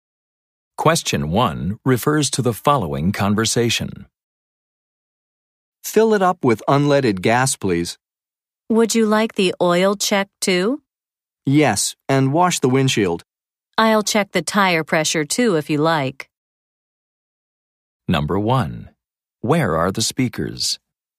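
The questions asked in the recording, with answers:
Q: Where are the speakers?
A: At a gas station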